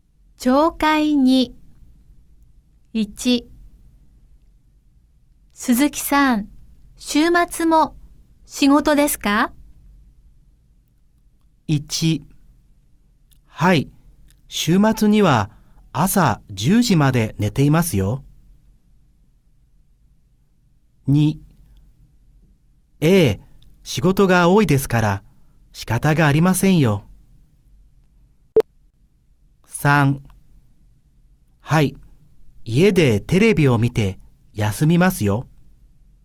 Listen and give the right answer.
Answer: 好,所以答案是二。